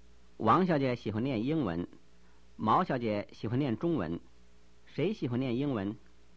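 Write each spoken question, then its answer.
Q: 谁喜欢念英文?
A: 王小姐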